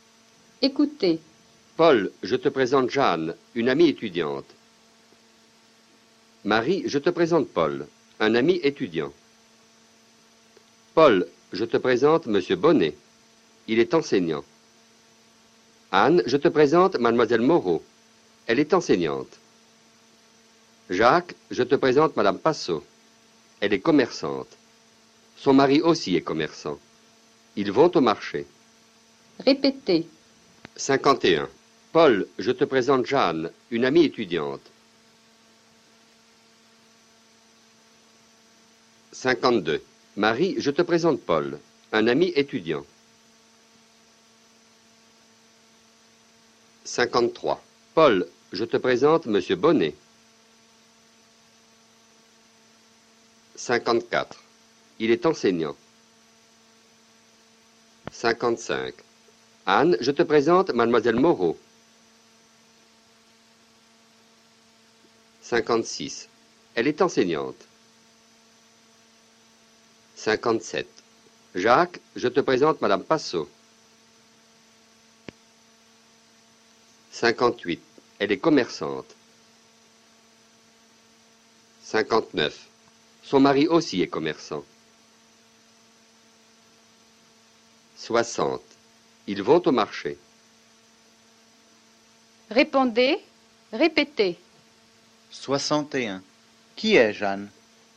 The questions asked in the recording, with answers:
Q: Qui est Jeanne?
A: Jeanne est une amie étudiante.